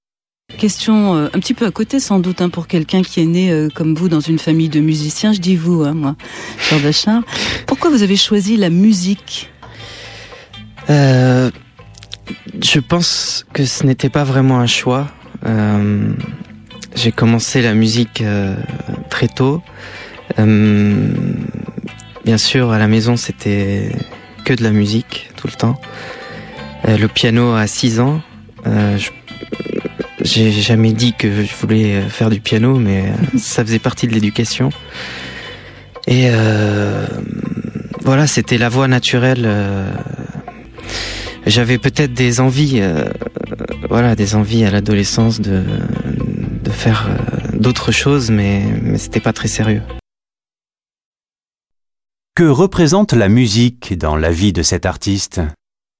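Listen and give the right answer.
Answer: Une voie naturelle, pas vraiment un choix : elle faisait partie de son éducation familiale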